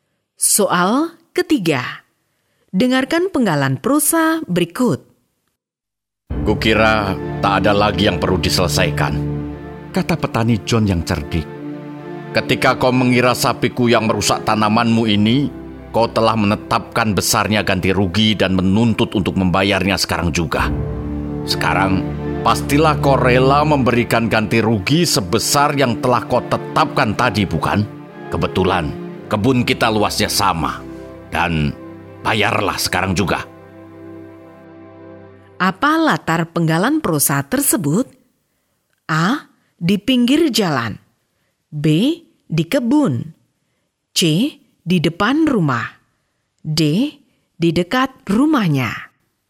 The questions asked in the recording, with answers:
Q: Apa latar penggalan prosa tersebut?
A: Jawaban yang benar adalah B. Di kebun.